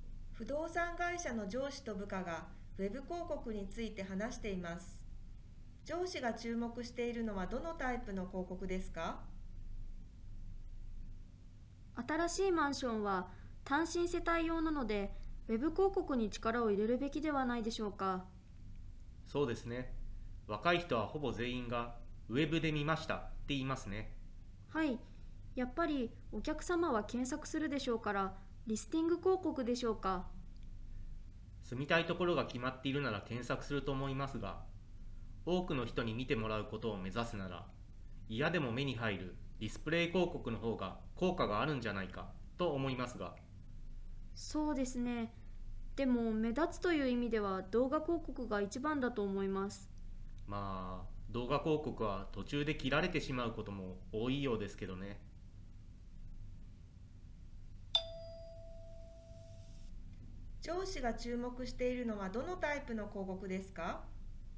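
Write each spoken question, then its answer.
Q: 上司が注目しているのはどのタイプの広告ですか?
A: ディスプレイ広告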